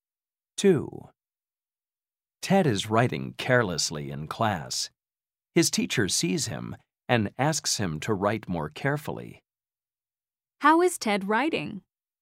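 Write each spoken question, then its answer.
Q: How is Ted writing?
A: carelessly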